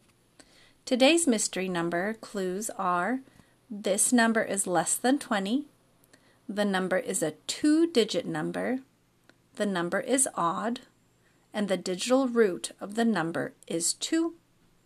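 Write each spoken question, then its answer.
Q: Today's mystery number clues are: this number is less than 20, the number is a two-digit number, the number is odd, and the digital root of the number is 2.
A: 11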